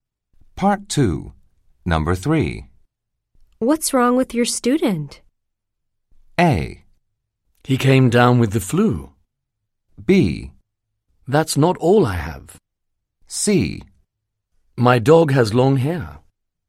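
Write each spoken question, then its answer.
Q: What's wrong with your student?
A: A: He came down with the flu.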